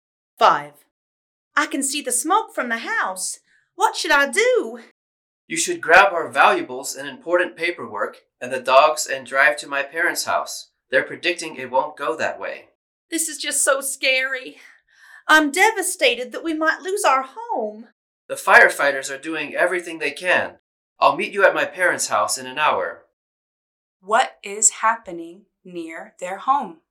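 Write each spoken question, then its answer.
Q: What is happening near their home?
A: A fire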